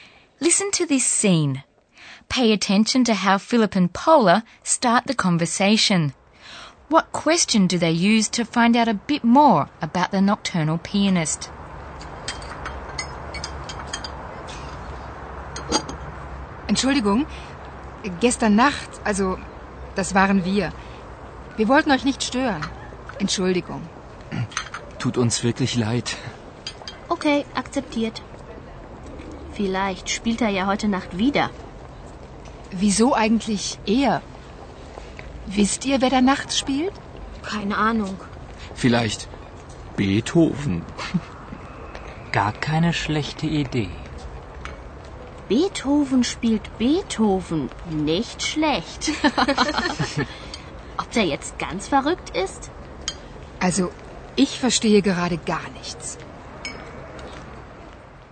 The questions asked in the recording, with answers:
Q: What question do they use to find out a bit more about the nocturnal pianist?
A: And this remark prompts Paula to ask whether the students know who is playing at night.